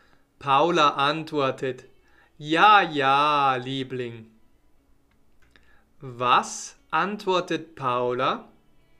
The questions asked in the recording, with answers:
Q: Was antwortet Paula?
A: Ja, ja, Liebling.